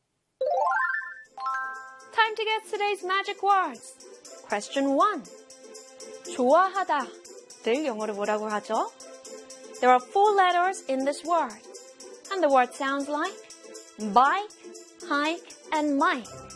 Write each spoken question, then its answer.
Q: 좋아하다. 늘 영어로 뭐라고 하죠?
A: 좋아하다 in English is L-I-K-E, like.